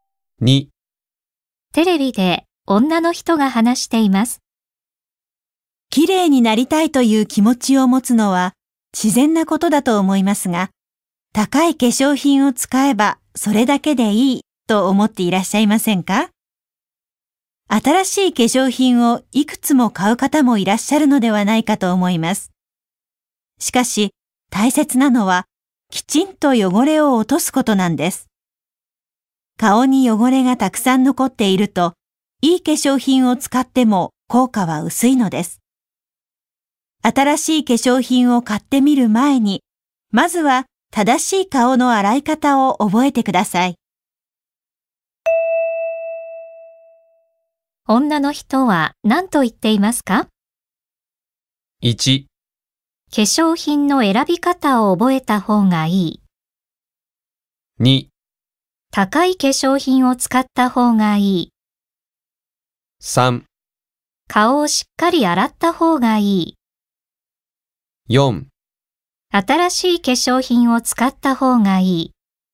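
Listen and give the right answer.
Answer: 3: 顔をしっかり洗った方がいい。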